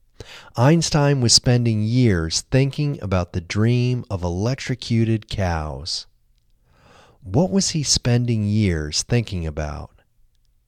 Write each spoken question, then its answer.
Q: What was he spending years thinking about?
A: He was spending years thinking about the dream of electrocuted cows.